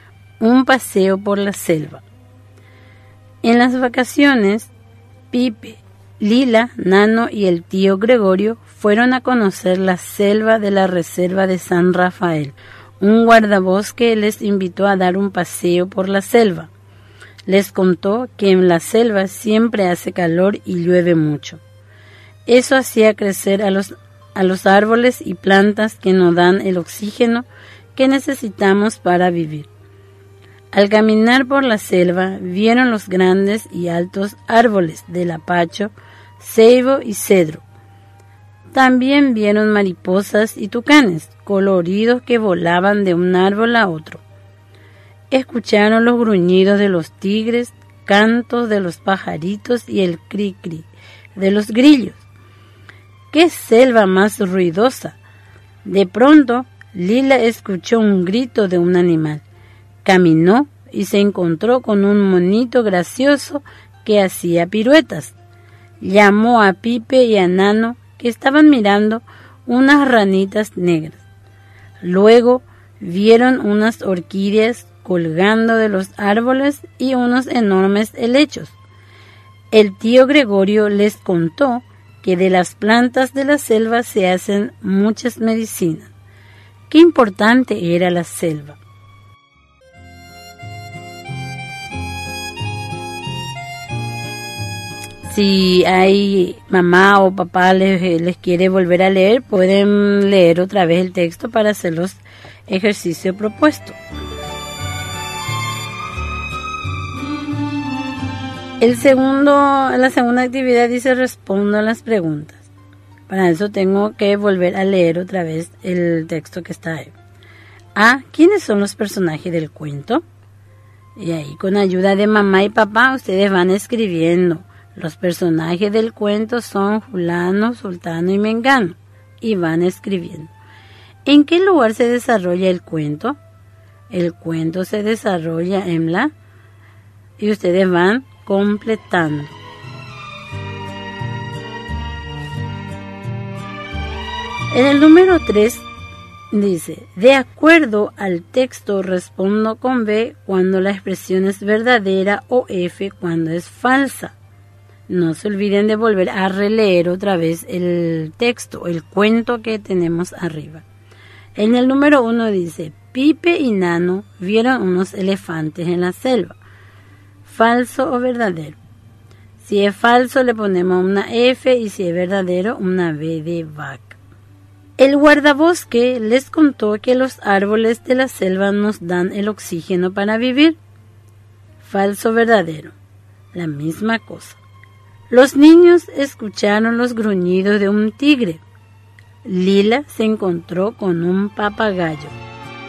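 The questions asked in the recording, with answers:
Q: ¿Quiénes son los personajes del cuento?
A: Pipe, Lila, Nano, el tío Gregorio y el guardabosque

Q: ¿En qué lugar se desarrolla el cuento?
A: En la selva de la Reserva de San Rafael

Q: Pipe y Nano vieron unos elefantes en la selva.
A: Falso

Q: El guardabosque les contó que los árboles de la selva nos dan el oxígeno para vivir.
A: Verdadero

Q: Los niños escucharon los gruñidos de un tigre.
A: Verdadero

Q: Lila se encontró con un papagayo.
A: Falso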